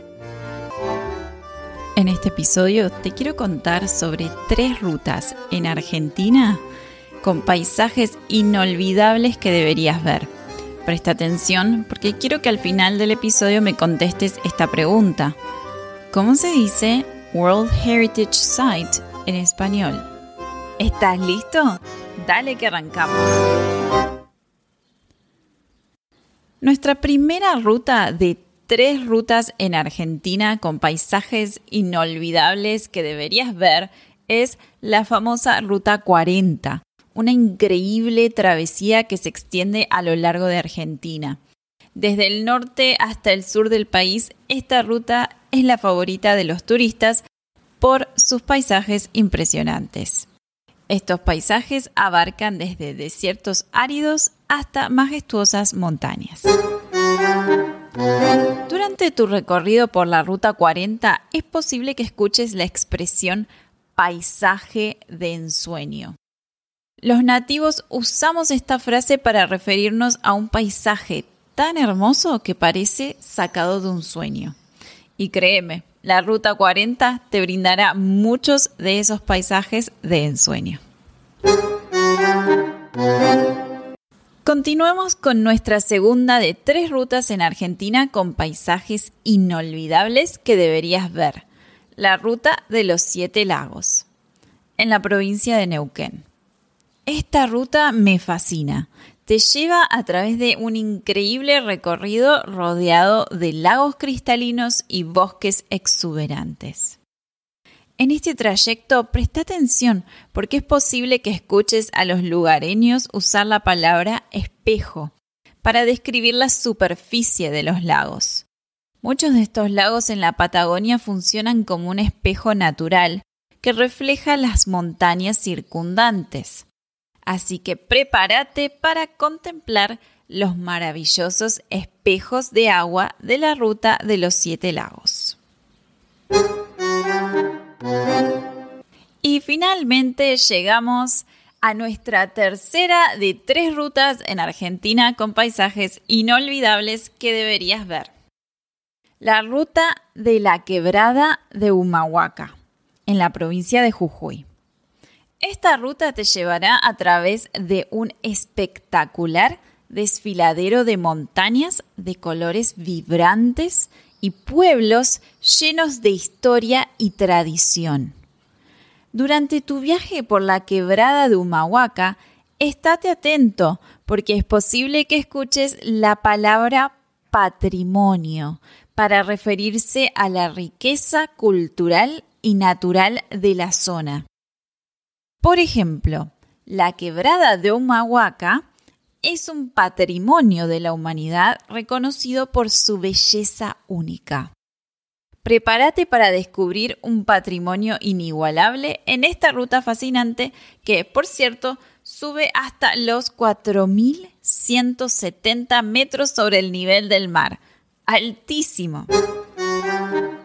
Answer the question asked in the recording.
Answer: ahora sabes que World Heritage Site en español se dice Patrimonio de la Humanidad.